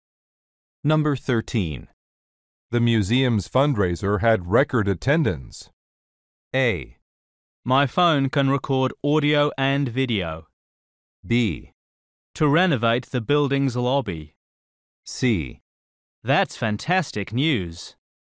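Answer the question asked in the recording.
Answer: C: That's fantastic news.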